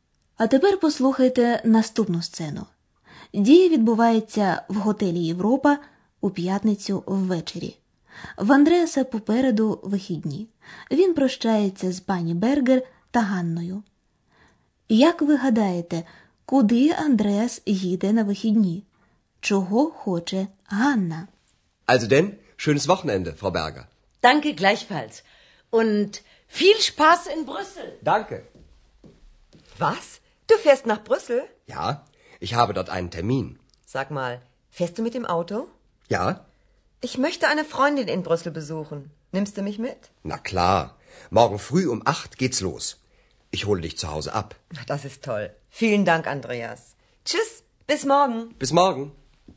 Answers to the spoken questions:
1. Отже, у вихідні Андреас збирається поїхати машиною до Брюсселя.
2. А Ганна хоче провідати свою подругу, яка там живе.